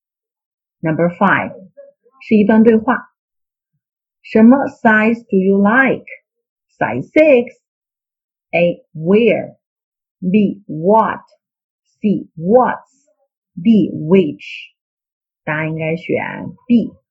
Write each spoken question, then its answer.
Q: 什么 size do you like? Size six. A, where? B, what? C, what's? D, which?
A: 答案应该选 B.